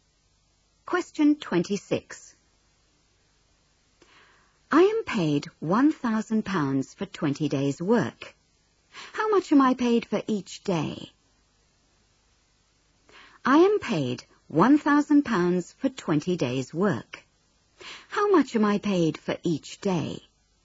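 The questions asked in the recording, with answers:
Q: How much am I paid for each day?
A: £50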